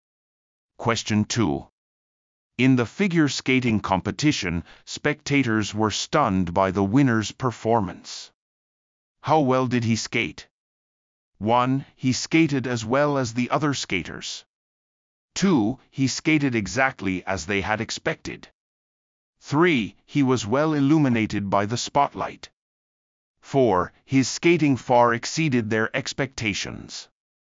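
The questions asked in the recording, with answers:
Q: How well did he skate?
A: 4: His skating far exceeded their expectations.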